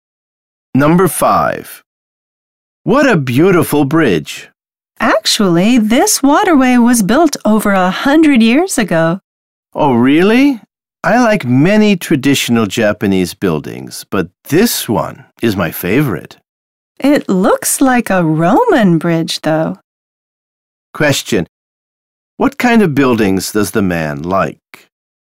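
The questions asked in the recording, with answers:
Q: What kind of buildings does the man like?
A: Traditional Japanese buildings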